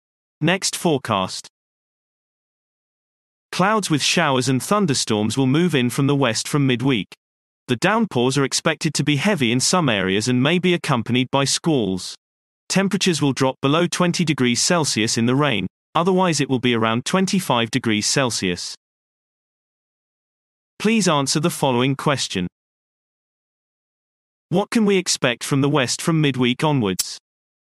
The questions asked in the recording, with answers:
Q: What can we expect from the west from midweek onwards?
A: Clouds with showers and thunderstorms will move in from the west from midweek.